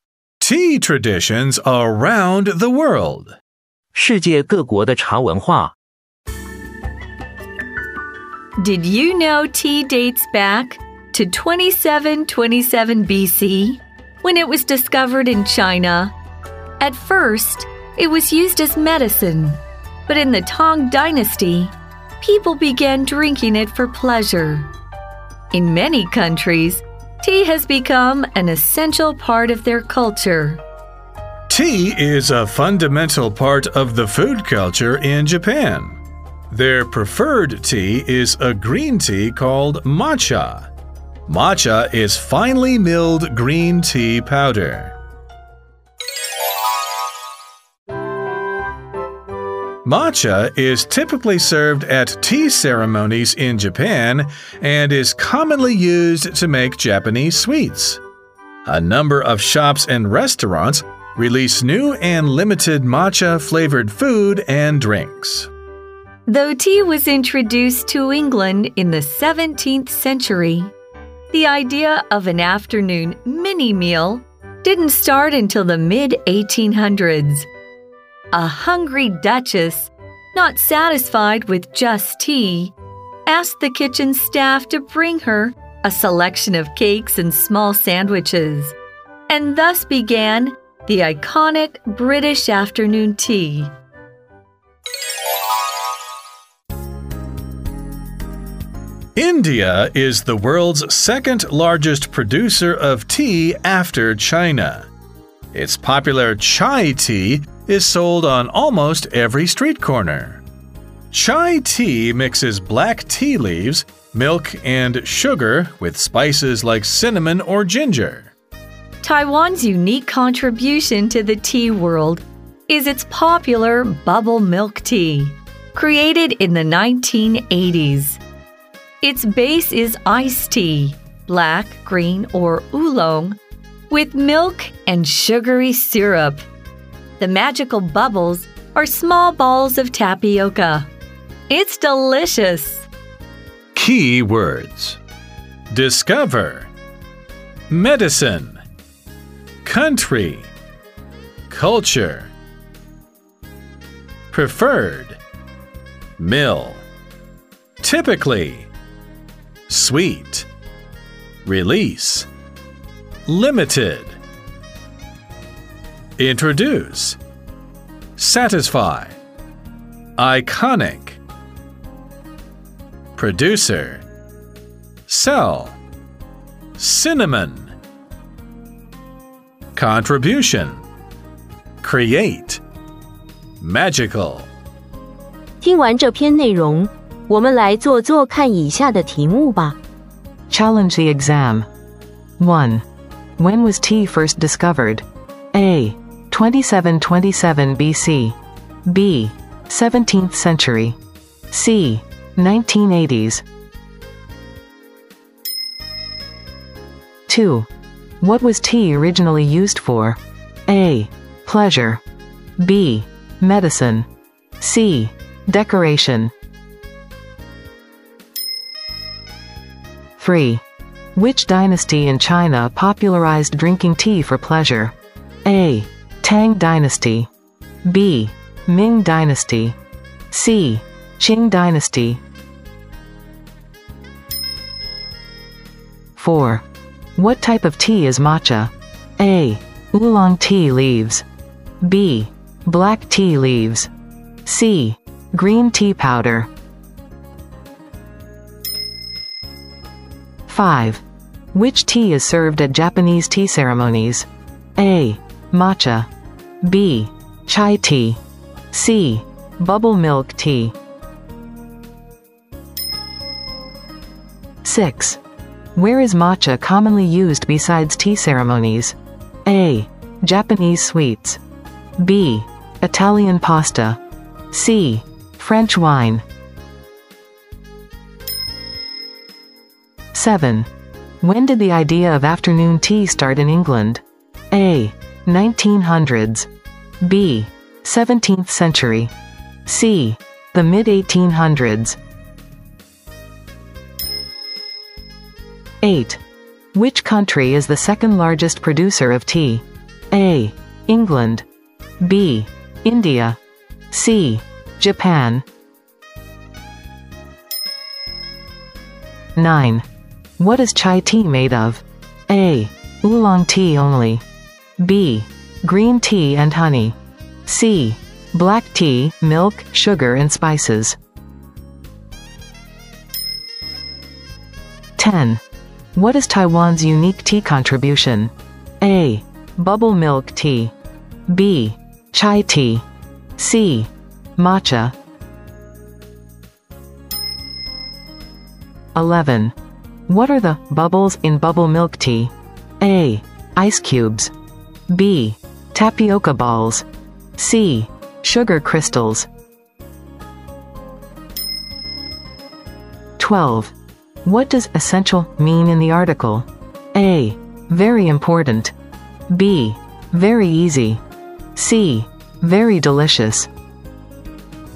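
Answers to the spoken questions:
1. A: 2727 BC
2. B: Medicine
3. A: Tang Dynasty
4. C: Green tea powder
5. A: Matcha
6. A: Japanese sweets
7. C: The mid-1800s
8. B: India
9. C: Black tea, milk, sugar and spices
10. A: Bubble milk tea
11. B: Tapioca balls
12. A: Very important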